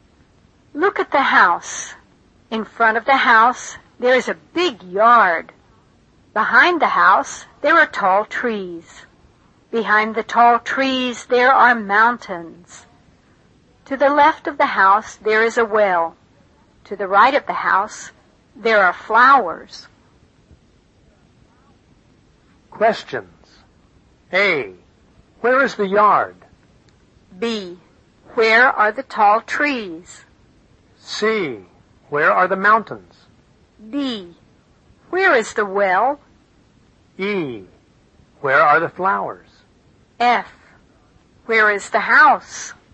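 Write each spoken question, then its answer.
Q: Where is the yard?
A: In front of the house

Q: Where are the tall trees?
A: Behind the house

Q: Where are the mountains?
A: Behind the tall trees

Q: Where is the well?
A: To the left of the house

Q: Where are the flowers?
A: To the right of the house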